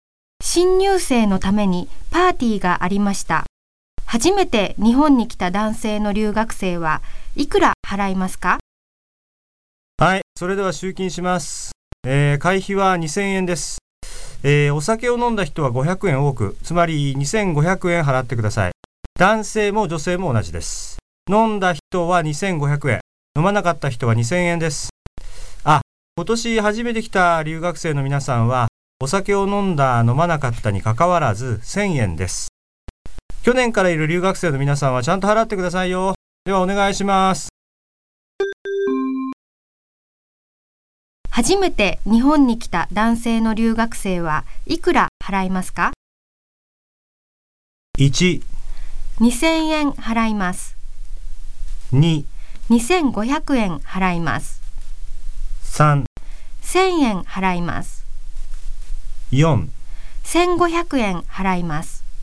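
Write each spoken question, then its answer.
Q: 初めて日本に来た男性の留学生はいくら払いますか?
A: 3: 1000円払います。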